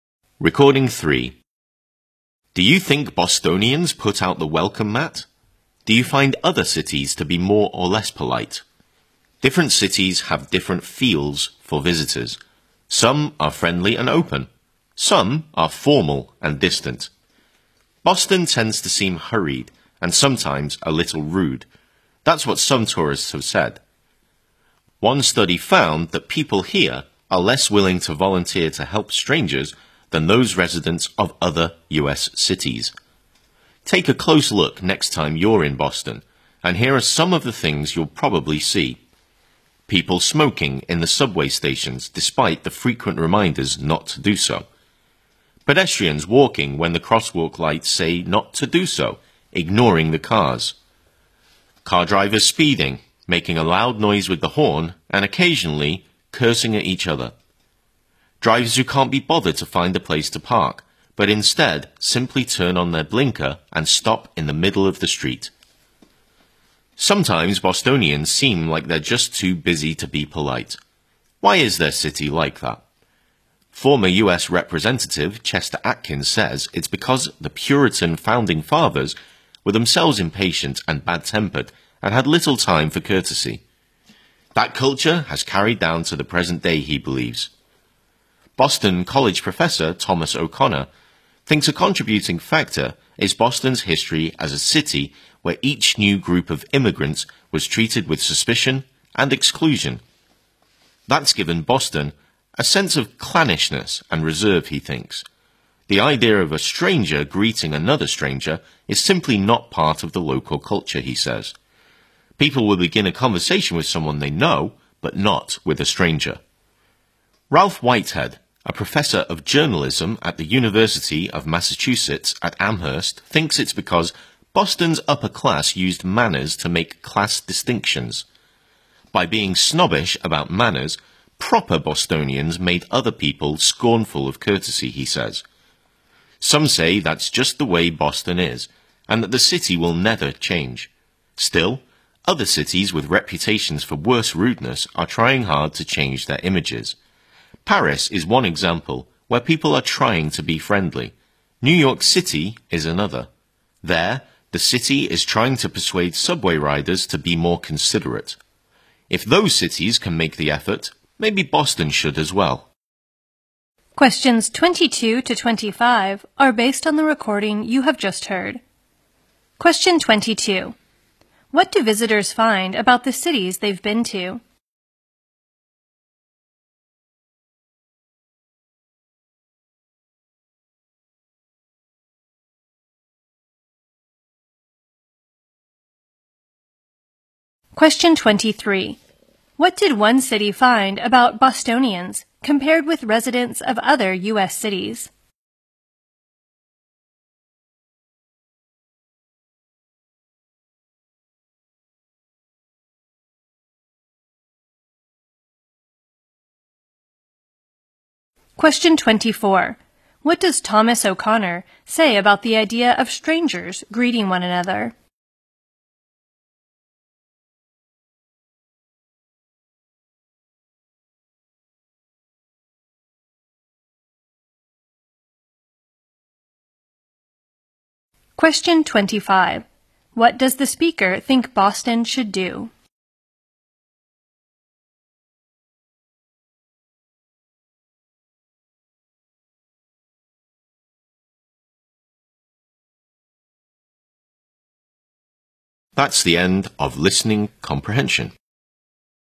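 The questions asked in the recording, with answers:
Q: What did one city find about Bostonians compared with residents of other U.S. cities?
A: They are less willing to volunteer to help strangers.

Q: What does Thomas O'Connor say about the idea of strangers greeting one another?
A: It is simply not part of the local culture.

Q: What does the speaker think Boston should do?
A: Make an effort to be more polite and change its image.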